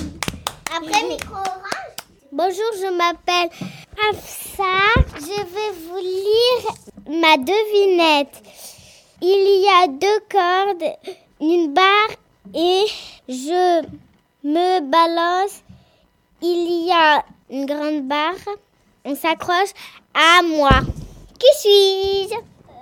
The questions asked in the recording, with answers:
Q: Qui suis-je?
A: Un trapèze.